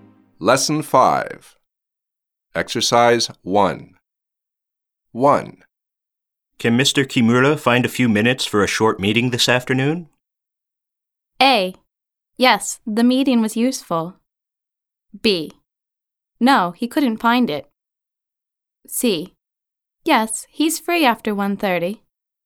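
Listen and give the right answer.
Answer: C: Yes, he's free after 1:30.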